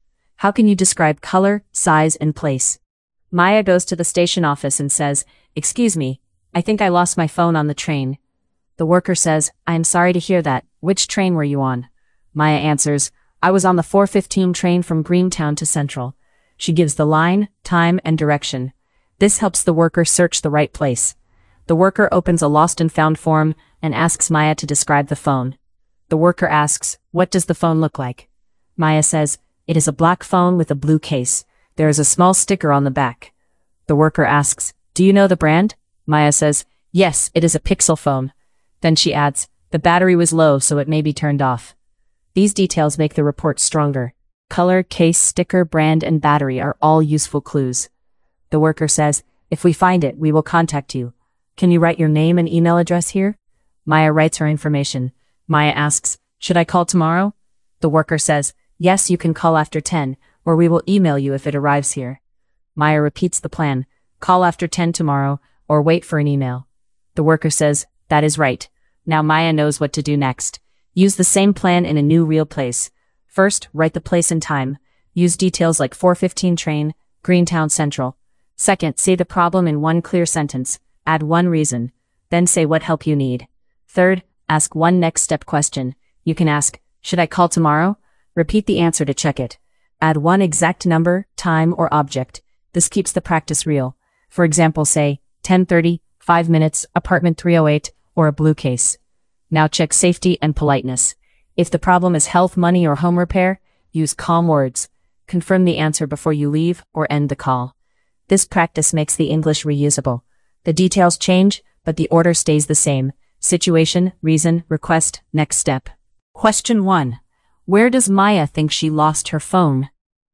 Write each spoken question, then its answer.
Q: Where does Maya think she lost her phone?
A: She thinks she lost it on the train.